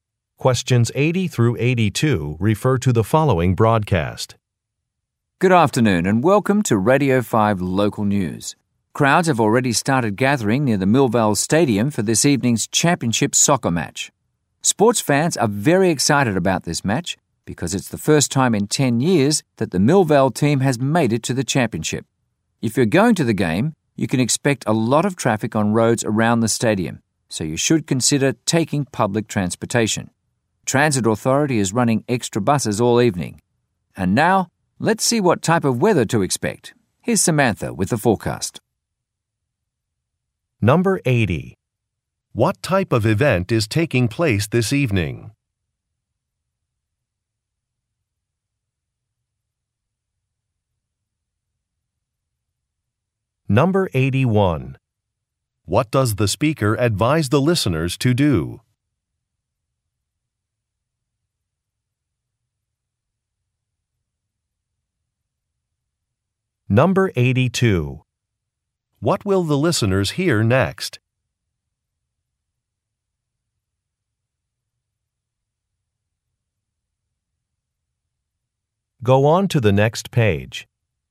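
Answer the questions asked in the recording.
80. A championship soccer match
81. Take public transportation
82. A weather forecast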